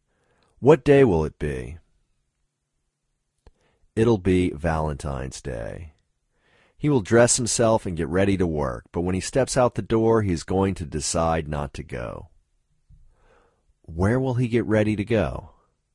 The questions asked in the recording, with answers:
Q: Where will he get ready to go?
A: He'll get ready to go to work.